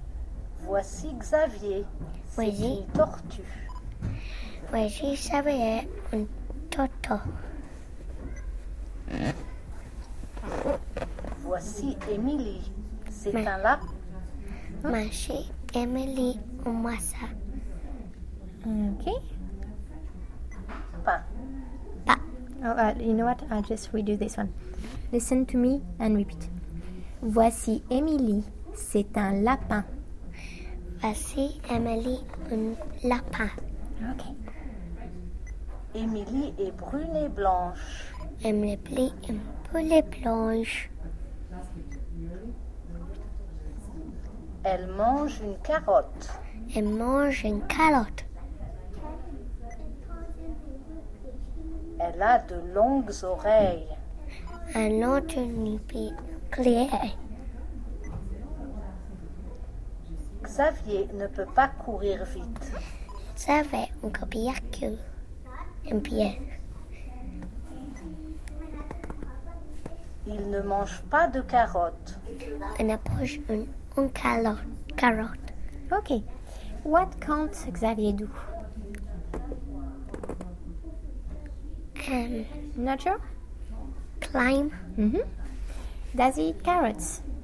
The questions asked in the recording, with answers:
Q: Does he eat carrots?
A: So you're right, he doesn't eat carrots.